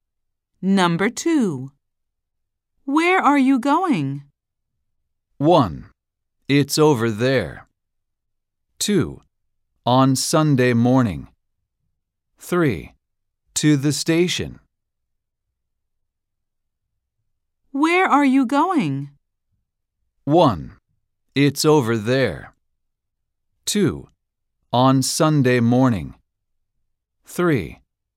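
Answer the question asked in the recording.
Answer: 3: To the station.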